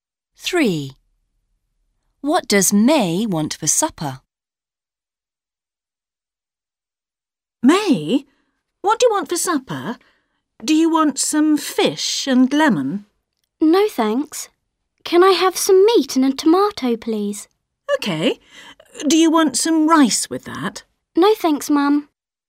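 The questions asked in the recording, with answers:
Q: What does May want for supper?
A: Meat and a tomato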